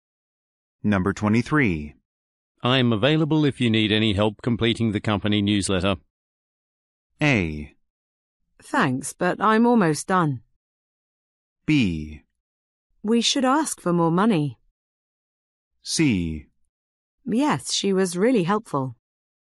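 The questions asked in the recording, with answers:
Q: I'm available if you need any help completing the company newsletter.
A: A: Thanks, but I'm almost done.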